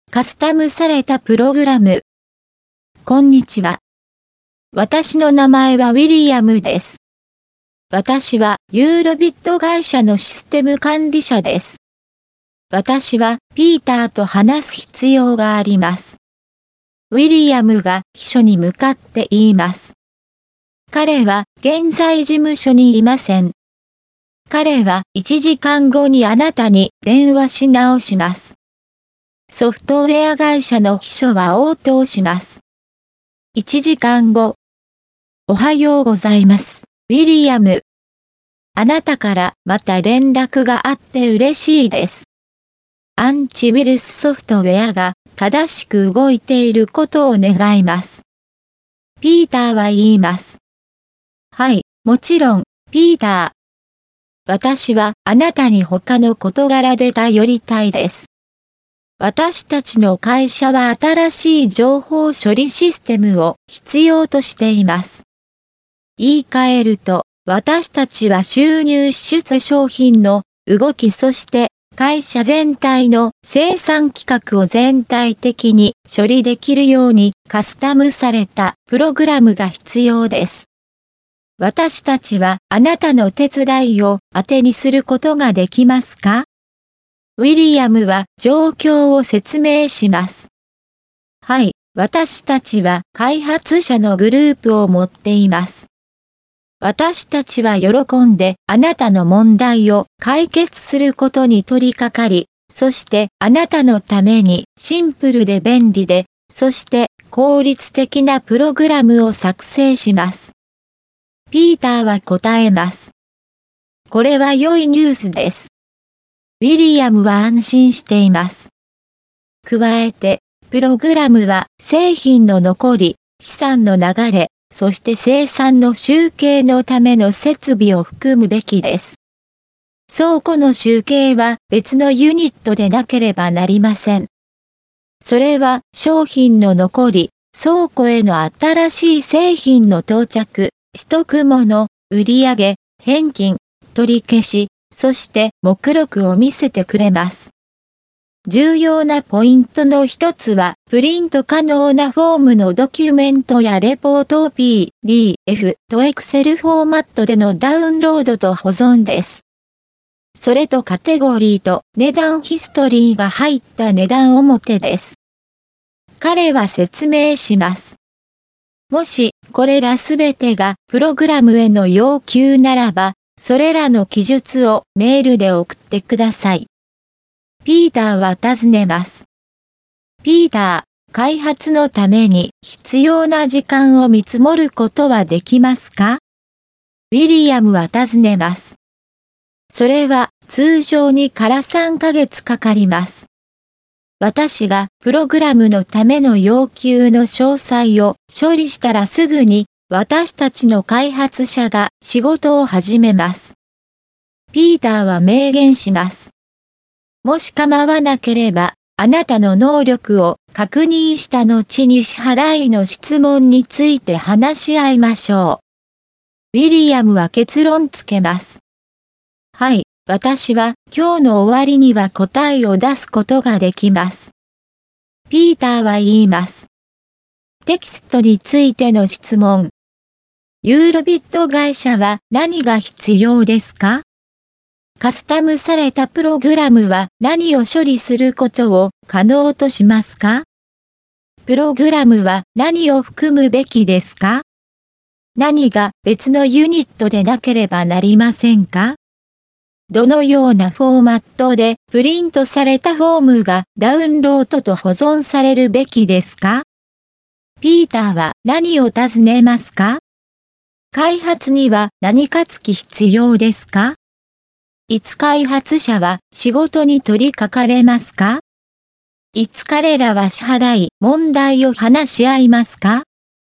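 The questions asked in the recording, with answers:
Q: ユーロビット会社は何が必要ですか?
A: 新しい情報処理システム(カスタムされたプログラム)

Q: カスタムされたプログラムは何を処理することを可能としますか?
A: 収入、支出、商品の動き、会社全体の生産規格

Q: プログラムは何を含むべきですか?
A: 製品の残り、資産の流れ、生産の集計のための設備

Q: 何が別のユニットでなければなりませんか?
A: 倉庫の集計

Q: どのようなフォーマットでプリントされたフォームがダウンロードと保存されるべきですか?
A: PDFとExcel

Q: 開発には何か付き必要ですか?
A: 通常3ヶ月

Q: いつ開発者は仕事に取り掛かれますか?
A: ピーターがプログラムの要求の詳細を処理したらすぐ

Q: いつ彼らは支払い問題を話し合いますか?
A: ピーターの会社の能力を確認した後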